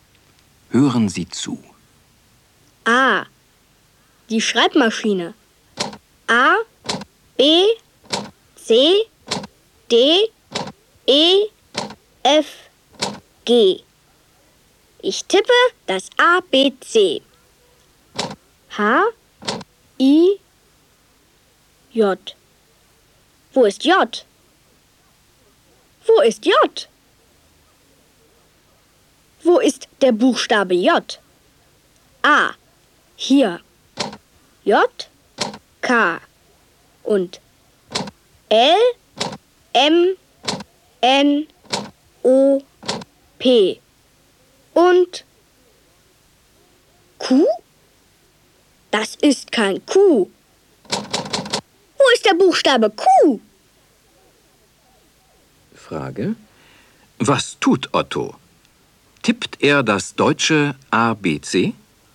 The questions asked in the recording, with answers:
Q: Was tut Otto? Tippt er das deutsche ABC?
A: Ja, er tippt das deutsche ABC.